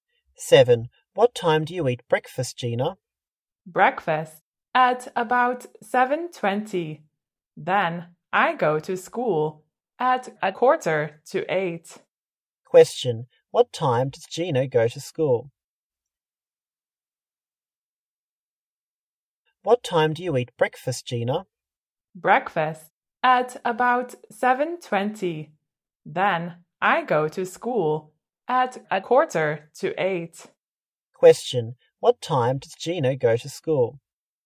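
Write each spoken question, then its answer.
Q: Question, what time does Gina go to school?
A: At 7:45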